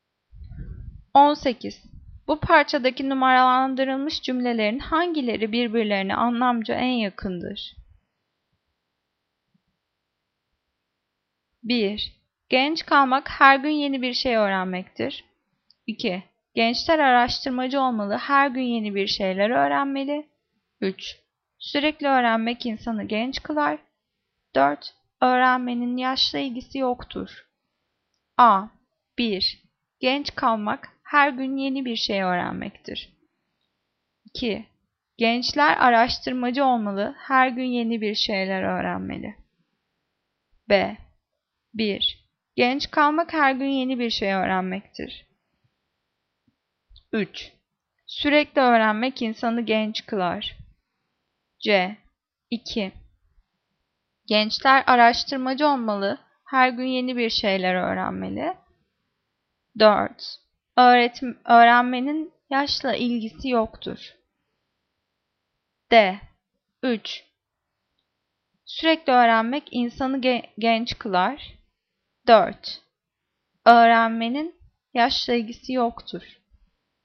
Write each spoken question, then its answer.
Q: Bu parçadaki numaralandırılmış cümlelerin hangileri birbirlerine anlamca en yakındır?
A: Cevap B. 1. Genç kalmak her gün yeni bir şey öğrenmektir.